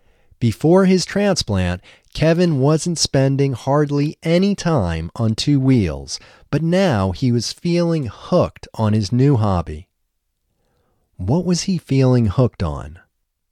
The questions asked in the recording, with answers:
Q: What was he feeling hooked on?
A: He was feeling hooked on his new hobby.